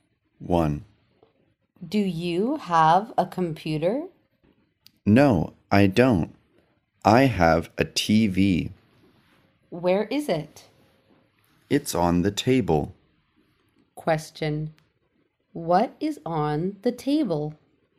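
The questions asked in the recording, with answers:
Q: What is on the table?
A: A TV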